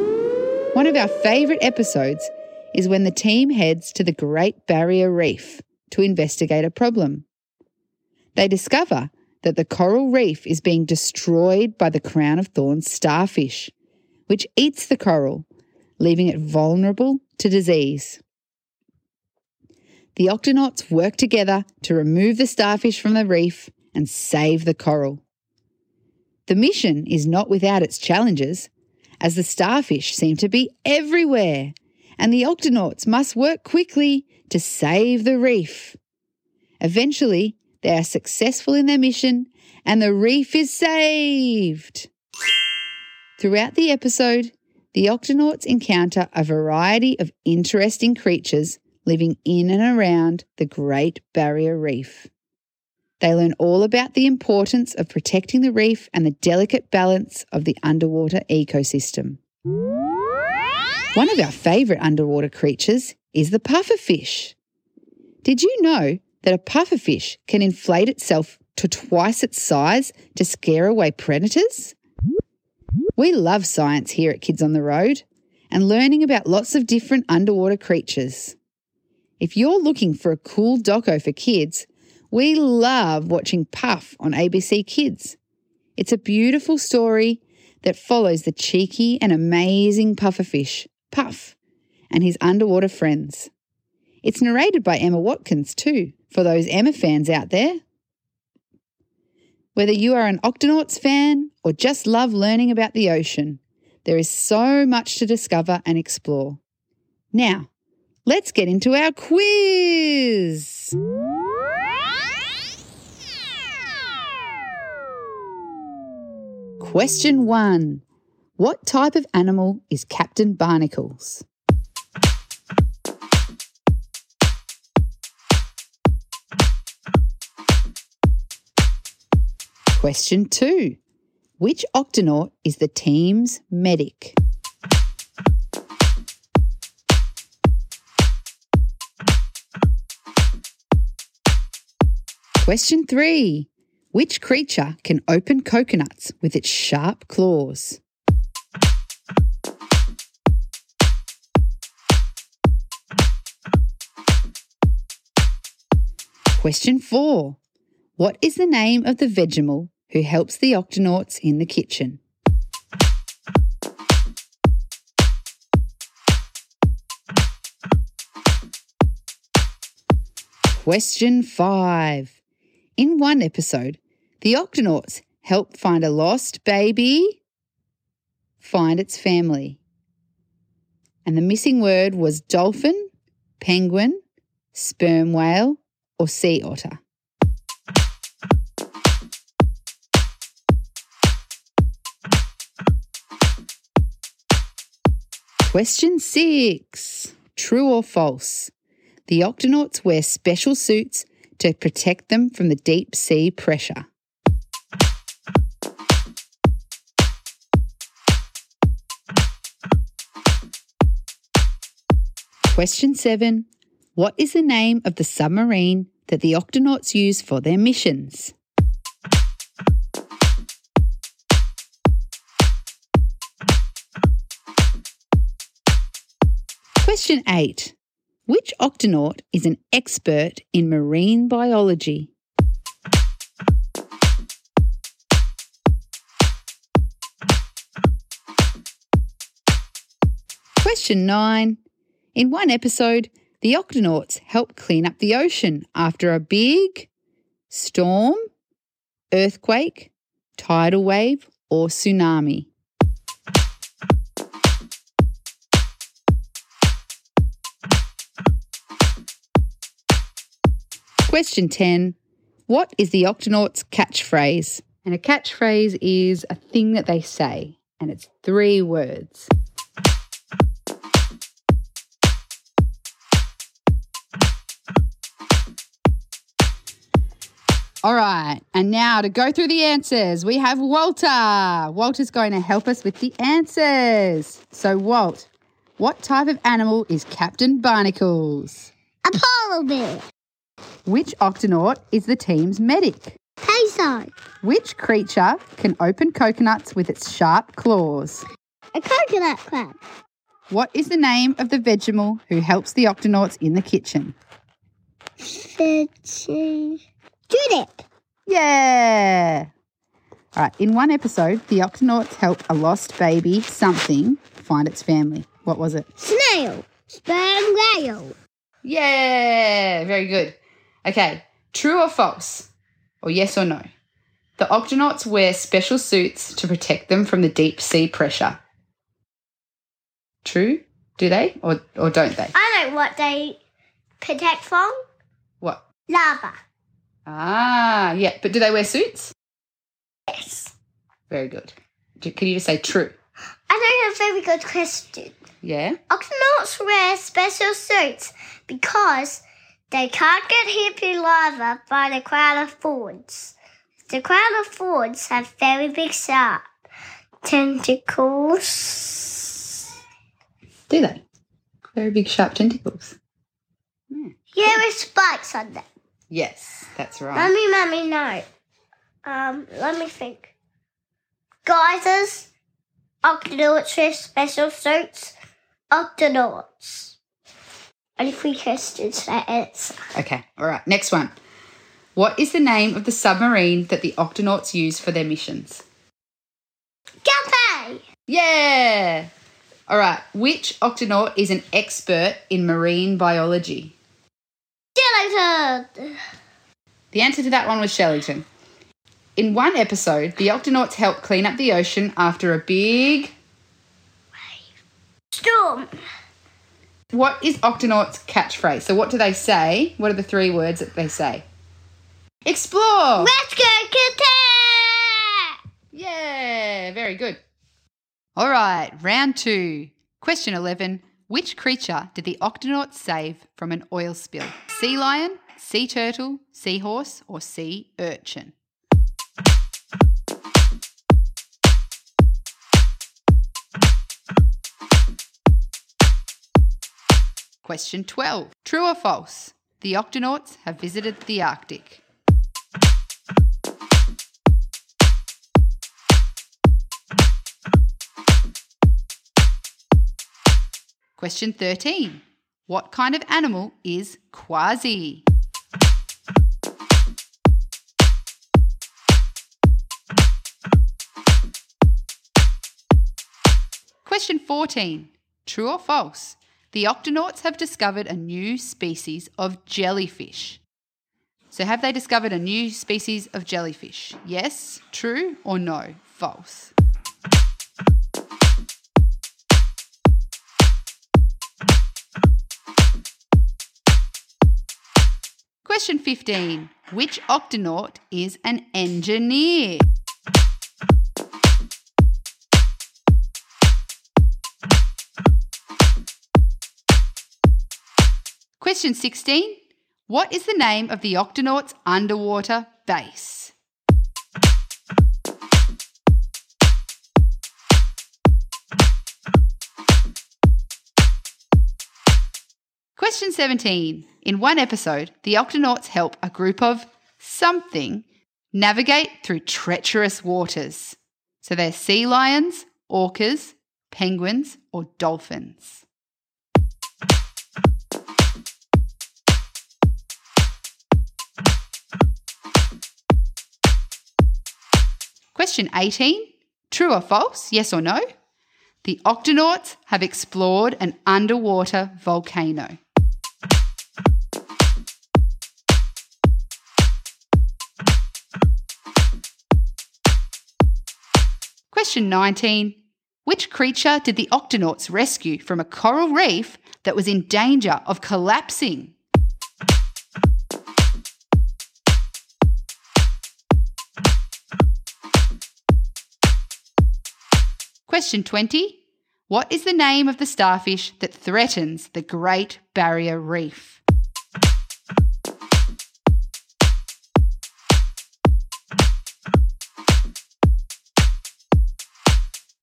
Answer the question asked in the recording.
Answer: Crown of Thorns.